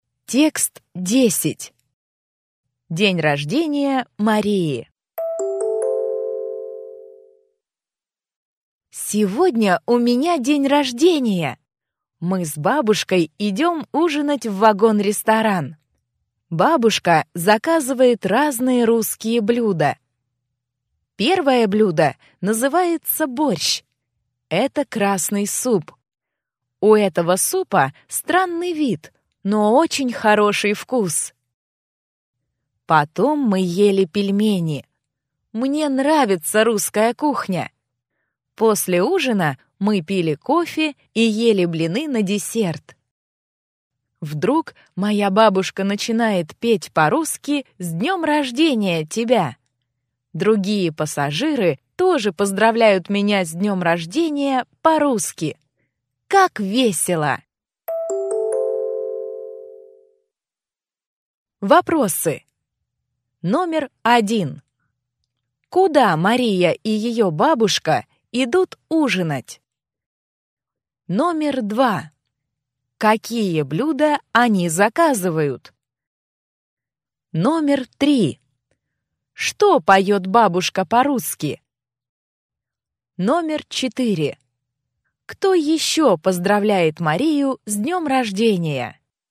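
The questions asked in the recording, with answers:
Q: Куда Мария и ее бабушка идут ужинать?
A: В вагон-ресторан

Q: Какие блюда они заказывают?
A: Разные русские блюда: борщ, пельмени, блины

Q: Что поет бабушка по-русски?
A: «С днем рождения тебя!»

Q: Кто еще поздравляет Марию с днем рождения?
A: Другие пассажиры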